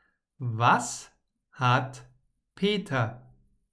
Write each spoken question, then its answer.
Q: Was hat Peter?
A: Stress. Peter hat Stress.